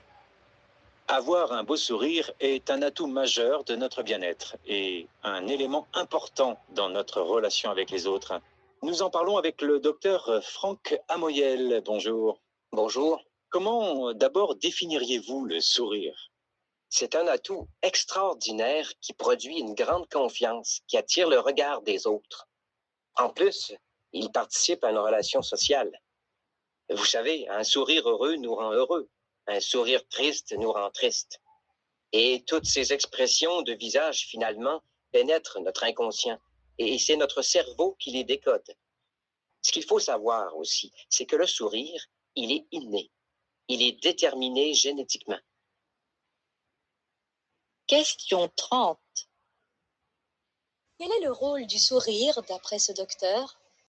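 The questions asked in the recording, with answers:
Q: Quel est le rôle du sourire, d'après ce docteur ?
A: Il donne confiance, attire le regard des autres et participe à la relation sociale.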